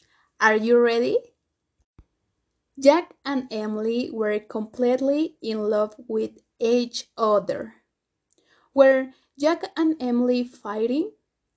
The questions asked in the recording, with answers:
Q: Were Jack and Emily fighting?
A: No, not fighting. They were in love.